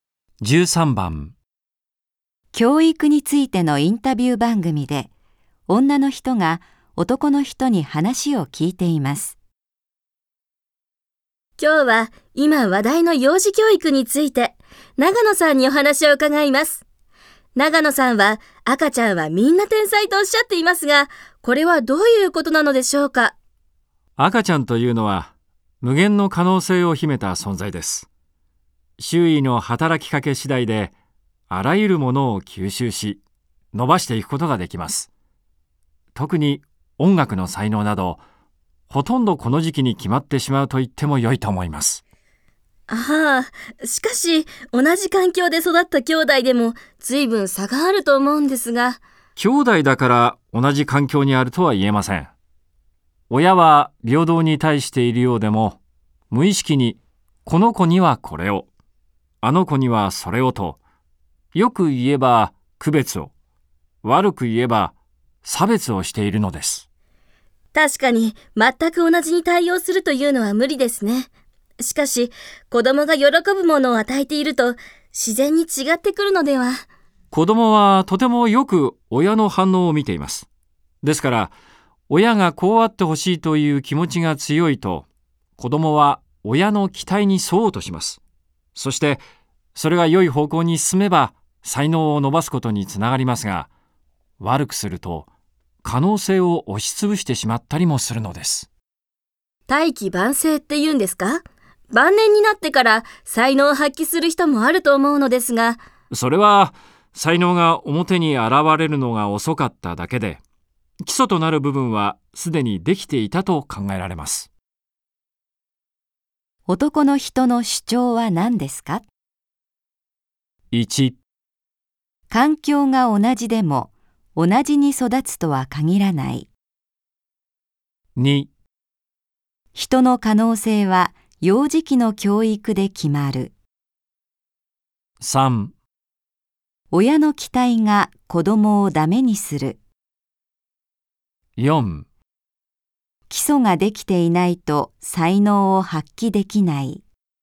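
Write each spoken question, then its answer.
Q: の人の主張は何ですか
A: 2: 人の可能性は幼児期の教育で決まる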